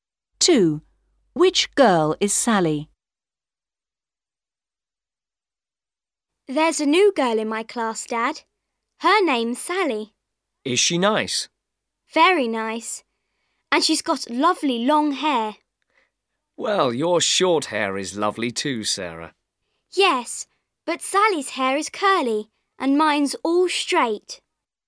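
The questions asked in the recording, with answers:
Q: Which girl is Sally?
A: The girl with long curly hair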